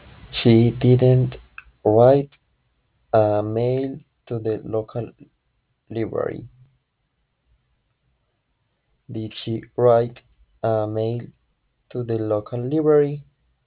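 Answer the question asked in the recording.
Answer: No, she didn't.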